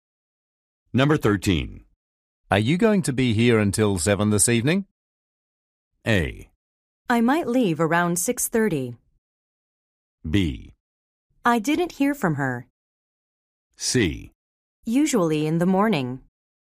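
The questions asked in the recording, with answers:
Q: Are you going to be here until 7 this evening?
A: A: I might leave around 6:30.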